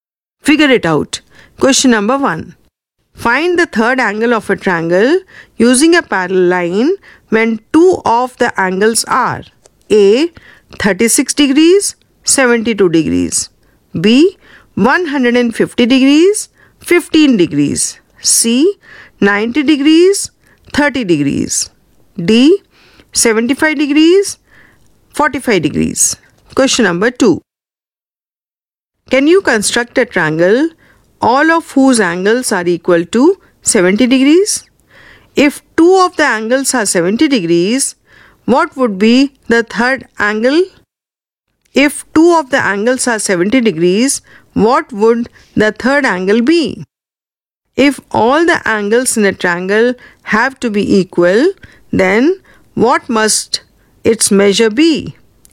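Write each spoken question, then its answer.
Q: Find the third angle of a triangle using a parallel line when two of the angles are A. 36 degrees, 72 degrees.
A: 72 degrees

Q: 150 degrees, 15 degrees.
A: 15 degrees

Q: 90 degrees, 30 degrees.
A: 60 degrees

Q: 75 degrees, 45 degrees.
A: 60 degrees

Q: Can you construct a triangle all of whose angles are equal to 70 degrees?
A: No

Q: If two of the angles are 70 degrees, what would be the third angle?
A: 40 degrees

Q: If all the angles in a triangle have to be equal, then what must its measure be?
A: 60 degrees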